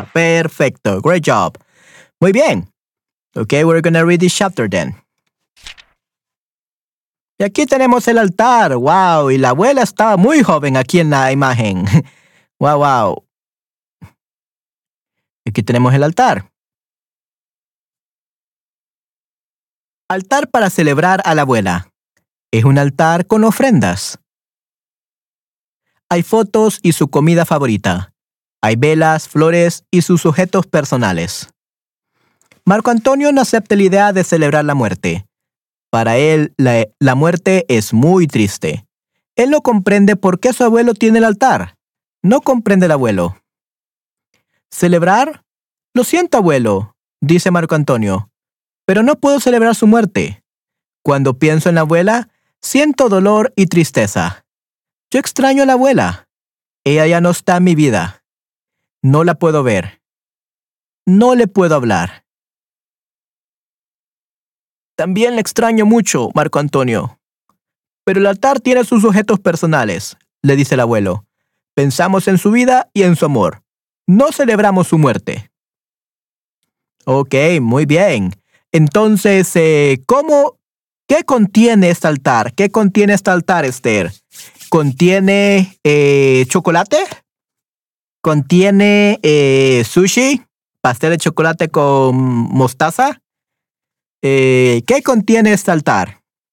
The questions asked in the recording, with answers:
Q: ¿Qué contiene este altar?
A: Hay una foto de la abuela, objetos personales de la abuela, comida preferida, flores.